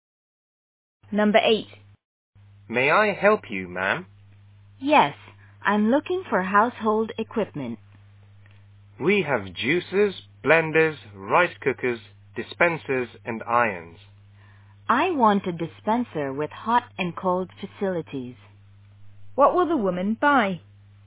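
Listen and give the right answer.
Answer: A dispenser with hot and cold facilities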